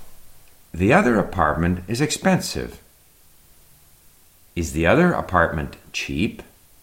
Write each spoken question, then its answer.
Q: Is the other apartment cheap?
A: No, the other apartment is not cheap.